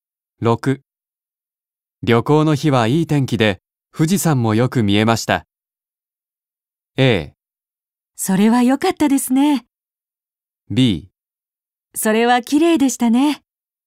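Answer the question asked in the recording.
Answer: A: それは良かったですね。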